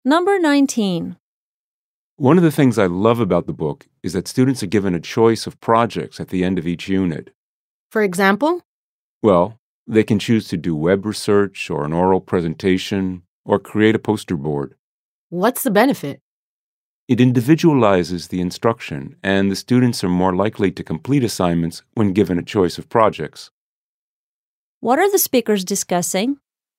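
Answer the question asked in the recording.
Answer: A book that gives students a choice of projects at the end of each unit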